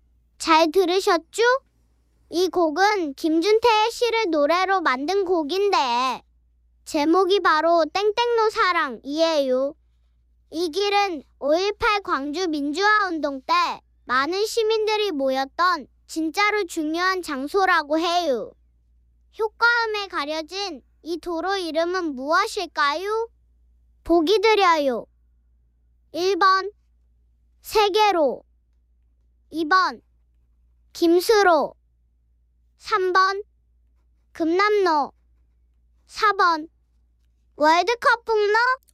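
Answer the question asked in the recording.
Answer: 3번: 금남로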